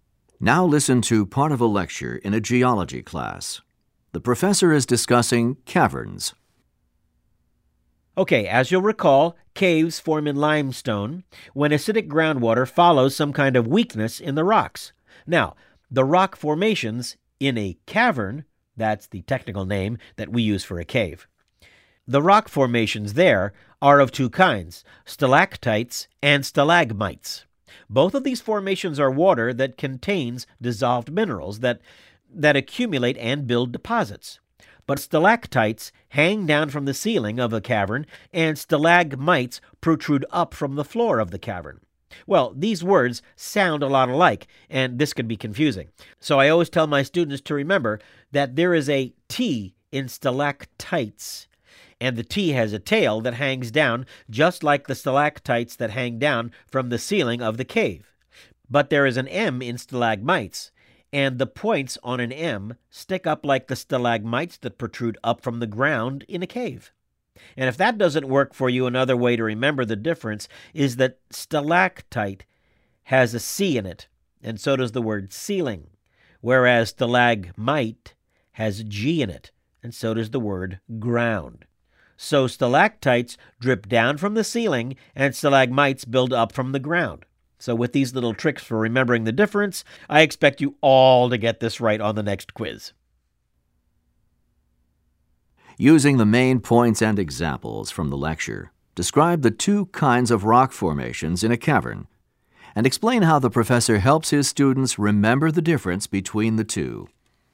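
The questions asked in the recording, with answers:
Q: Using the main points and examples from the lecture, describe the two kinds of rock formations in a cavern, and explain how the professor helps his students remember the difference between the two.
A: Stalactites hang down from the ceiling and stalagmites build up from the floor. Both form from mineral deposits left by water. To remember them: the T in stalactite has a tail that hangs down and the M in stalagmite has points that stick up. Also, stalactite has a C like ceiling and stalagmite has a G like ground.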